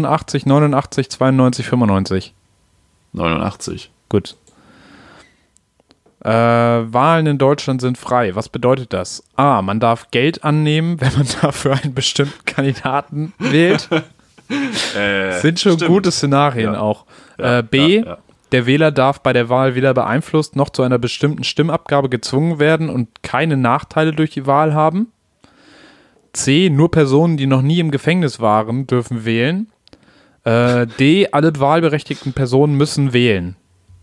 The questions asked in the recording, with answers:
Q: Was bedeutet das?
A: Ja, B.